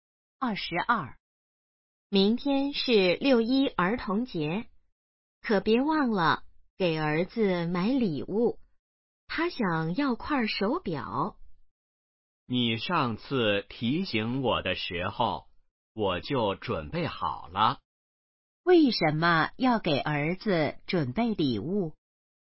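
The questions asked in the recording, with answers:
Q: 为什么要给儿子准备礼物?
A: 因为明天是六一儿童节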